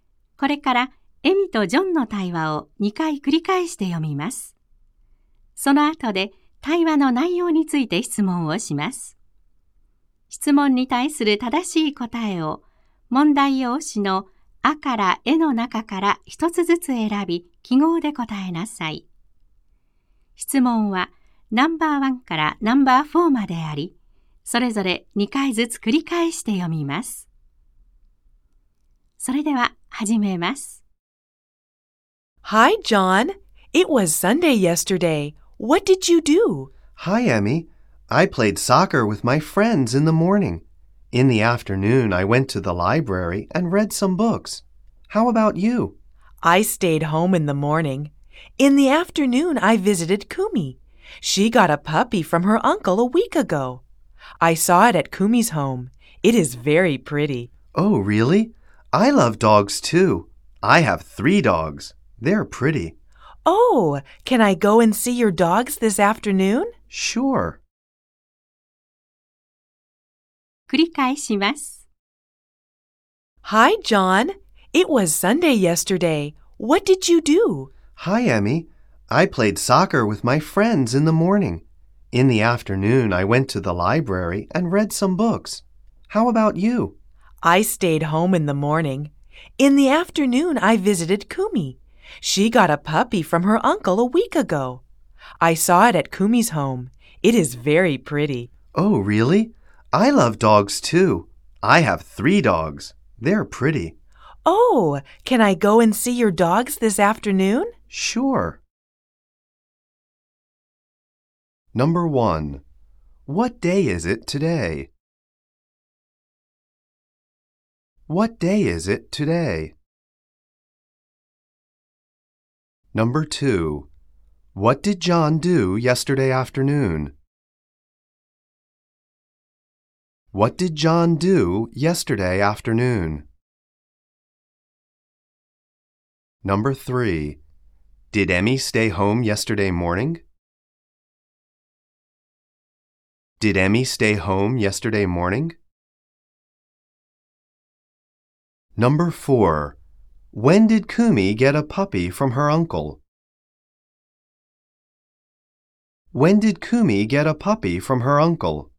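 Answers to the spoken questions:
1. Monday
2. He went to the library and read some books.
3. Yes, she did.
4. A week ago.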